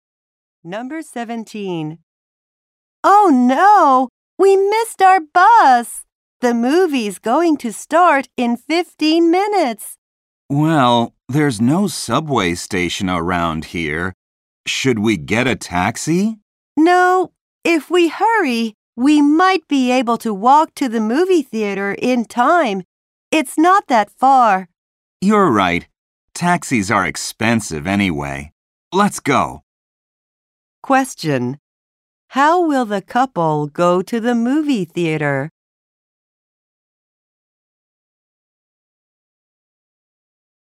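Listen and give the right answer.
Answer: They will walk.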